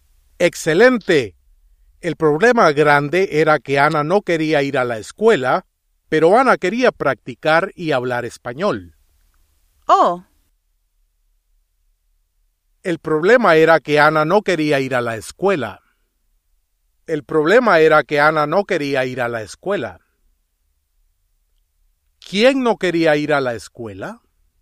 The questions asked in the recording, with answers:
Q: ¿Quién no quería ir a la escuela?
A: Ana.